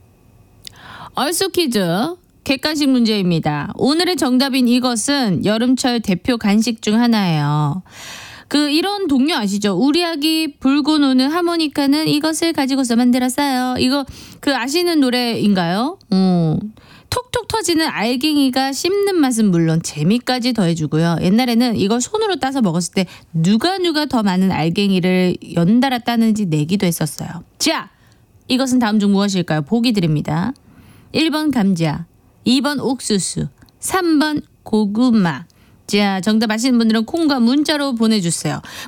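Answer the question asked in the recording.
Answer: 2번: 옥수수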